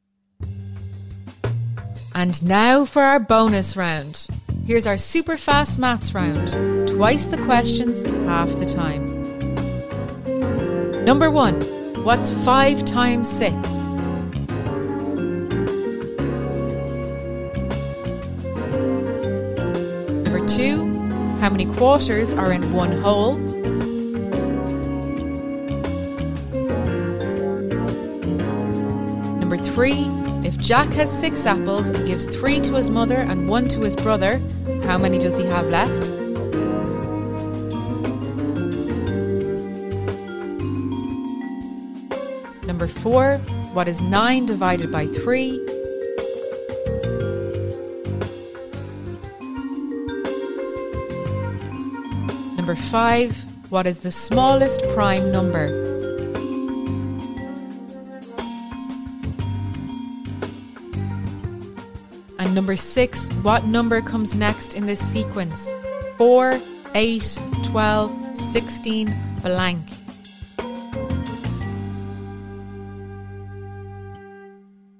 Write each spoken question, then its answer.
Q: what's 5 times 6?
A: The answer is 30.

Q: how many quarters are in one hole?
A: The answer is 4.

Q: what is 9 divided by 3?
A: The answer is 3.

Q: what number comes next in this sequence?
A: The answer is 20.